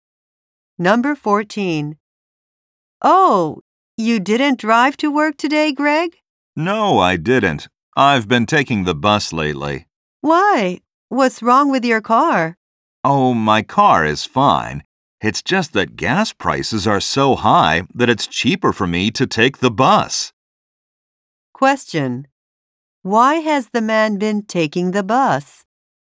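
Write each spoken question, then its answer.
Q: Why has the man been taking the bus?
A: Gas prices are high, so the bus is cheaper.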